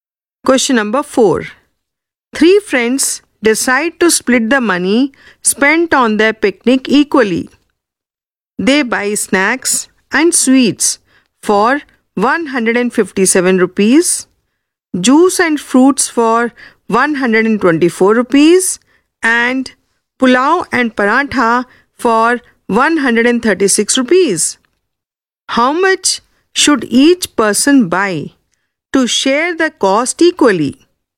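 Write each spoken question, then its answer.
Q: How much should each person buy to share the cost equally?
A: 139 rupees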